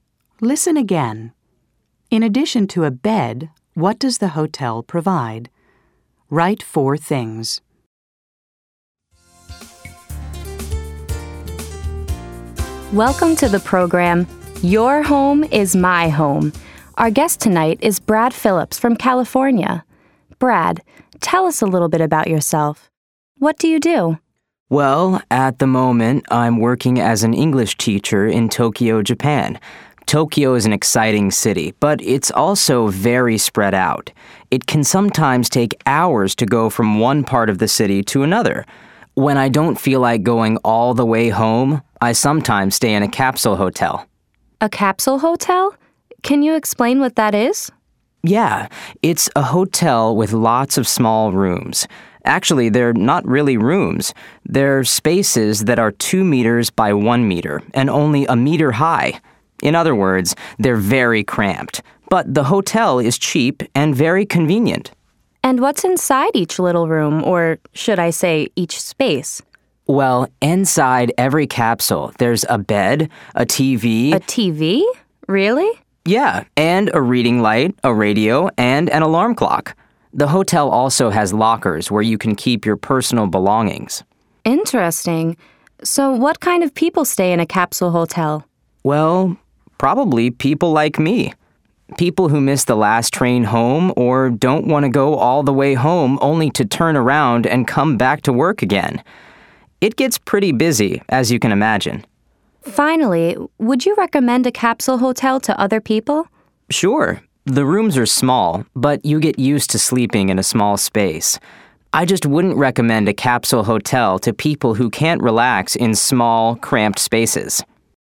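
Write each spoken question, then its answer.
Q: In addition to a bed, what does the hotel provide?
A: A TV, a reading light, a radio, and an alarm clock (also lockers)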